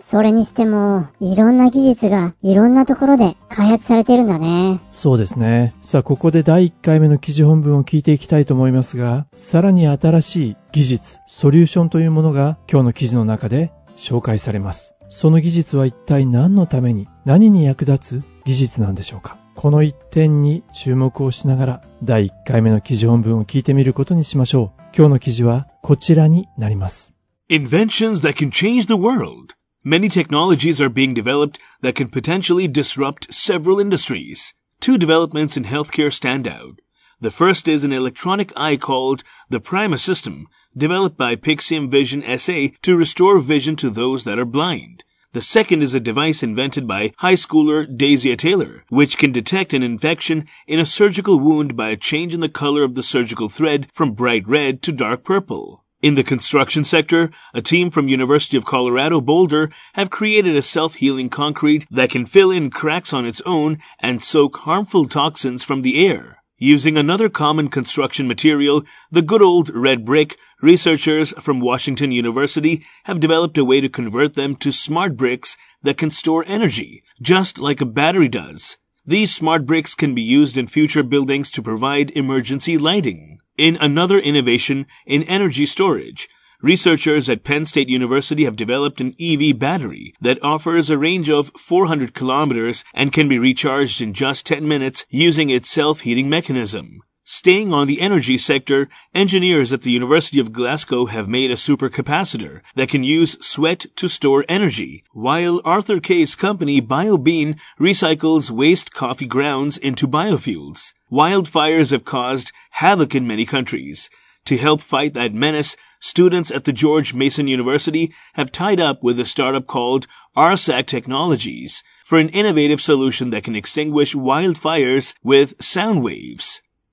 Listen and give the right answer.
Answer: Sound waves. 音波ですね。音波を使って wildfire 山火事を消すことができる。